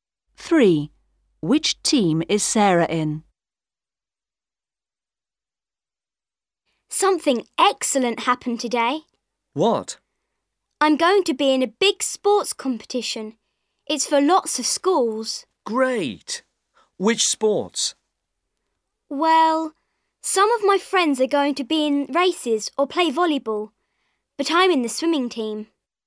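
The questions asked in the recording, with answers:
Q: Which team is Sarah in?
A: The swimming team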